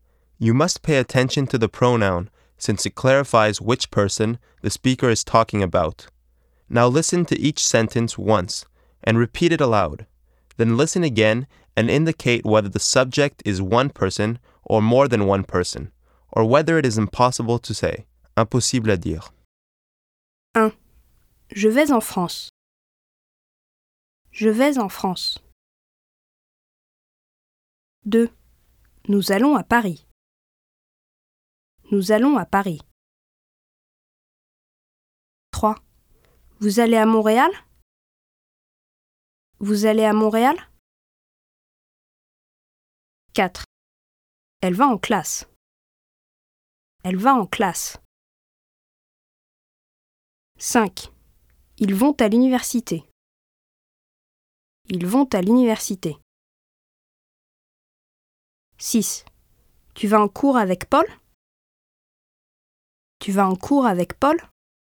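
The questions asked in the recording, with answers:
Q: Je vais en France.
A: one person

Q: Nous allons à Paris.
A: more than one person

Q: Vous allez à Montréal?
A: impossible à dire

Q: Elle va en classe.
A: one person

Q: Ils vont à l'université.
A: more than one person

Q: Tu vas en cours avec Paul?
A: one person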